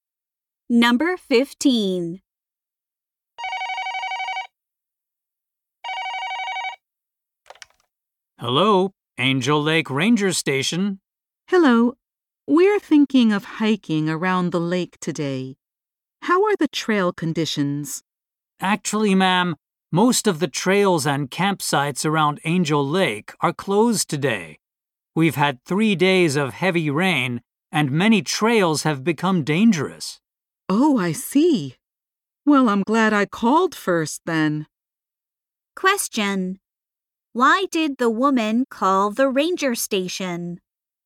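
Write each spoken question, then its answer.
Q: Why did the woman call the ranger station?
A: To ask about the trail conditions.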